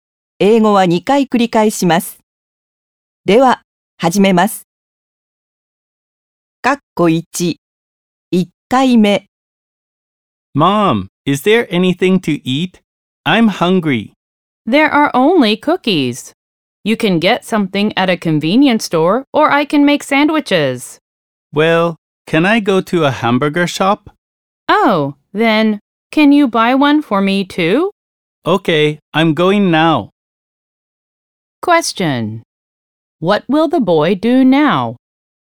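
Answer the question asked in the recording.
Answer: Go to a hamburger shop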